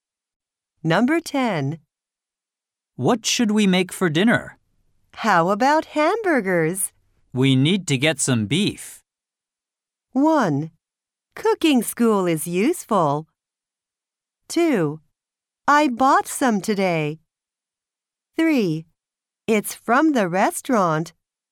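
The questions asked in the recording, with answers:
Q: We need to get some beef.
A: 2: I bought some today.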